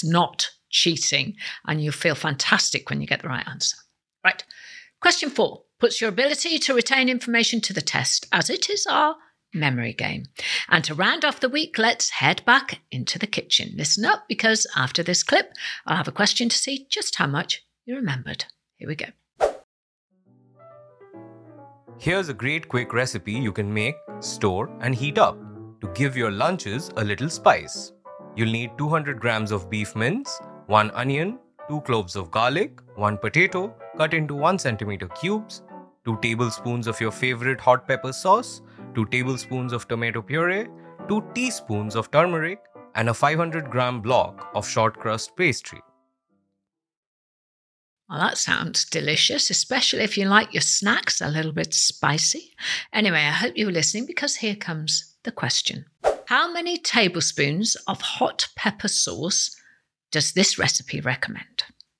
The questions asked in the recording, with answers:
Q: How many tablespoons of hot pepper sauce does this recipe recommend?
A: And the answer in the clip was 2 tablespoons.